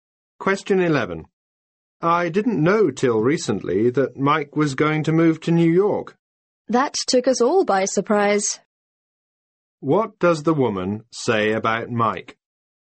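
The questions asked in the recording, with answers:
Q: What does the woman say about Mike?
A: Everyone was surprised that he was moving to New York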